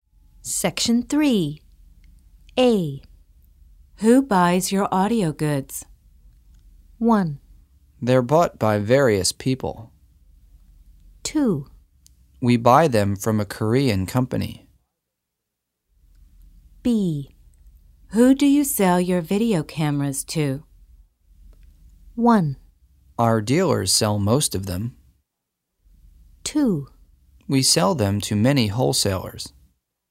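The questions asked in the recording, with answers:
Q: Who buys your audio goods?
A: 1: They're bought by various people.

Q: Who do you sell your video cameras to?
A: 2: We sell them to many wholesalers.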